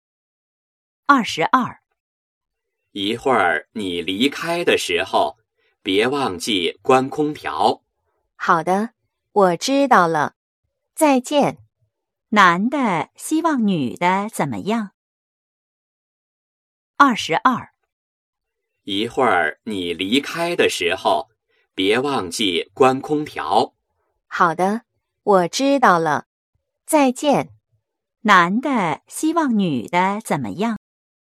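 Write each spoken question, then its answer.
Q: 男的希望女的怎么样?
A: 离开的时候关空调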